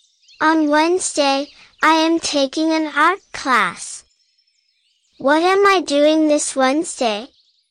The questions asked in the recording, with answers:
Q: What am I doing this Wednesday?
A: I'm taking an art class.